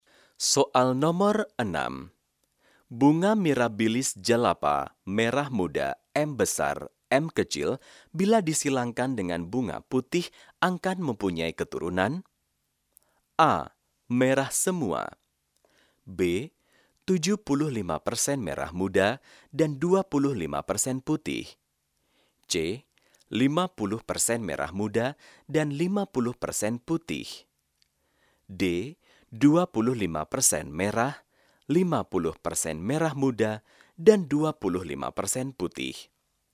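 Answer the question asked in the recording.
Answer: C: 50% merah muda dan 50% putih.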